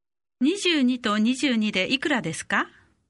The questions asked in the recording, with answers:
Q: 22と22でいくらですか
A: 44